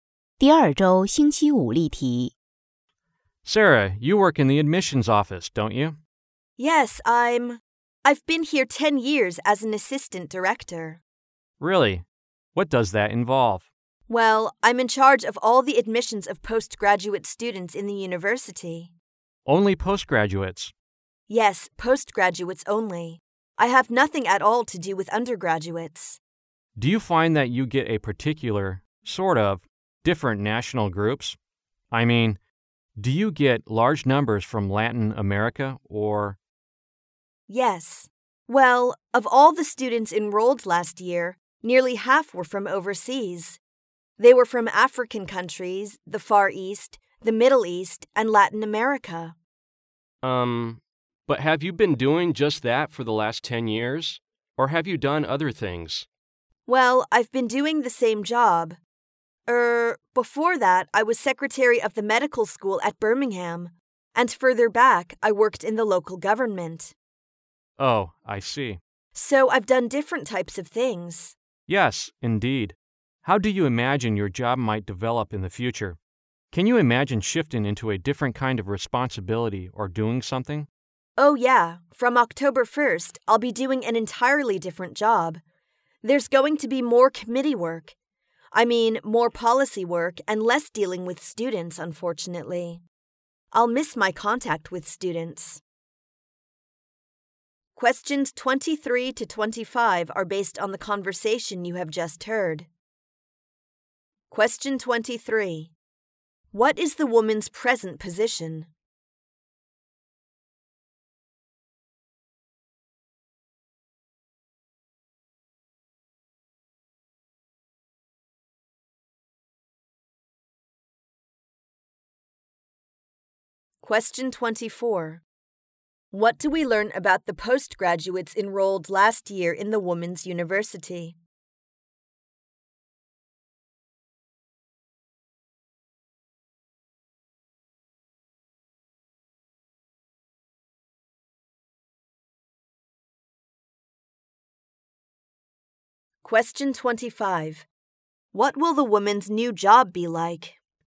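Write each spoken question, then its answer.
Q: What is the woman's present position?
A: Assistant director of the admissions office

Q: What do we learn about the postgraduates enrolled last year in the Women's University?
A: Nearly half were from overseas

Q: What will the woman's new job be like?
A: More committee and policy work, less dealing with students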